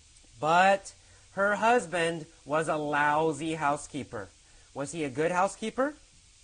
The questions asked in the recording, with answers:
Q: Was he a good housekeeper?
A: No. He was a very bad housekeeper.